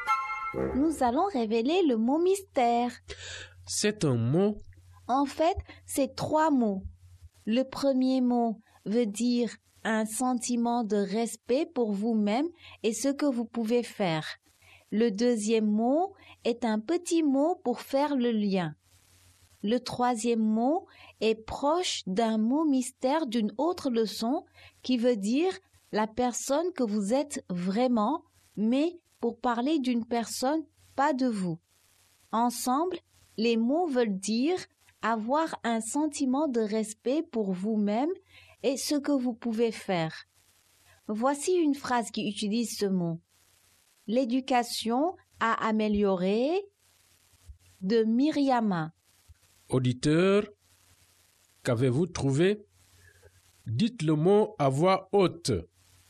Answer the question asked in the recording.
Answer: Le mot mystère est estime de soi.